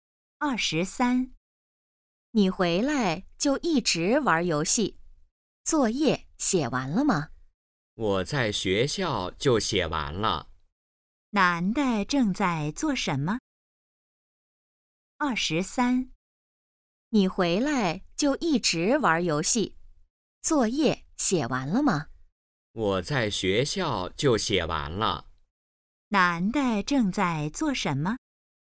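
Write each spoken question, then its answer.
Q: 男的正在做什么?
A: 玩游戏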